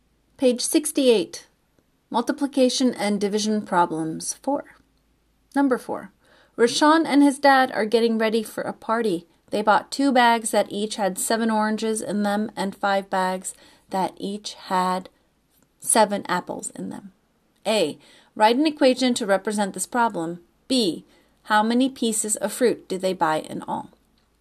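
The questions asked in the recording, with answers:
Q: B. How many pieces of fruit do they buy in all?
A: 49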